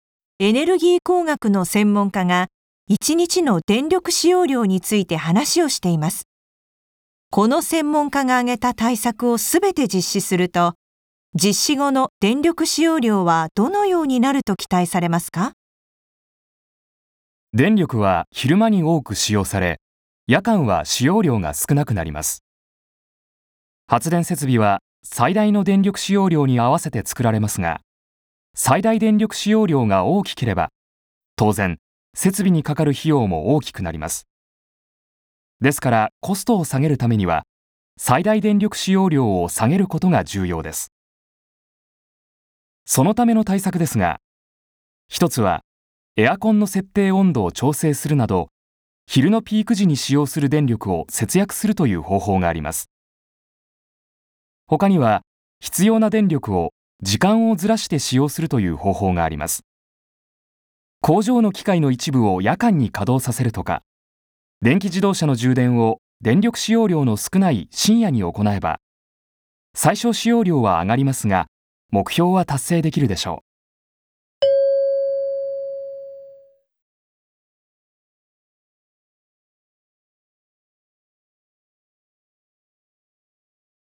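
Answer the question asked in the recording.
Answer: 昼のピーク時の使用量が下がり、夜間の最小使用量が上がって、一日の使用量の差が小さくなる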